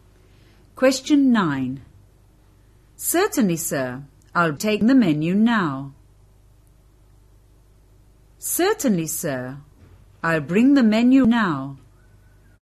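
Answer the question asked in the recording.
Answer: B: Certainly, sir. I'll bring the menu now.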